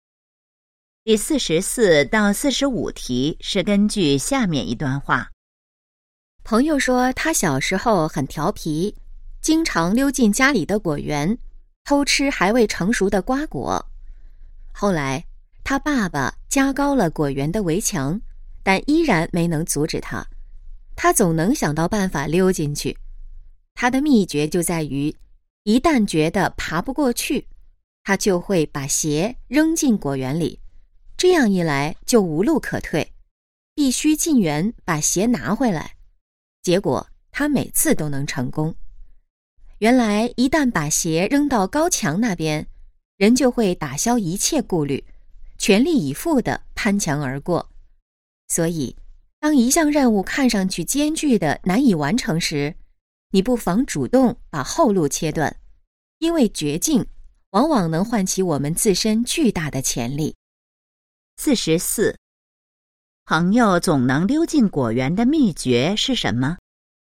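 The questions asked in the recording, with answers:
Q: 朋友总能溜进果园的秘诀是什么?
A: 先把鞋扔进果园里,断了自己的退路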